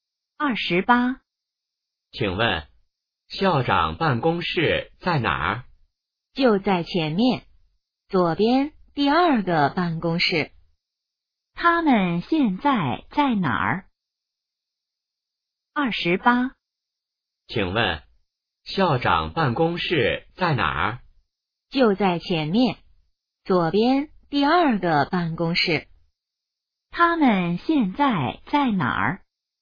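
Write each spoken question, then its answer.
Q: 他们现在在哪儿?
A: 学校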